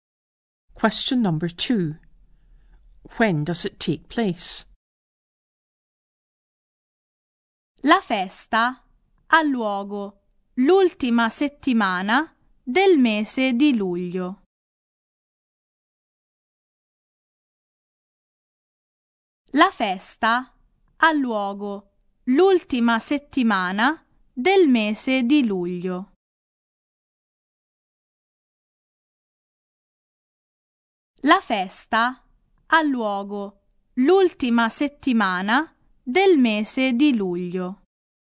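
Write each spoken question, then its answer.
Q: When does it take place?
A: The last week of July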